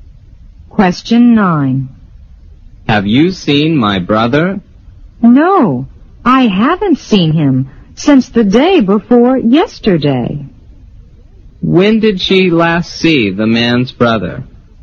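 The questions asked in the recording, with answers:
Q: When did she last see the man's brother?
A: The day before yesterday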